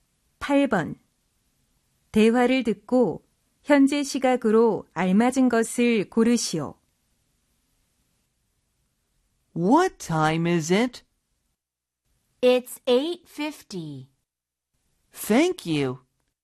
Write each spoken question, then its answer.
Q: 대화를 듣고 현재 시각으로 알맞은 것을 고르시오.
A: 8:50 하면 8시 50분을 뜻하죠.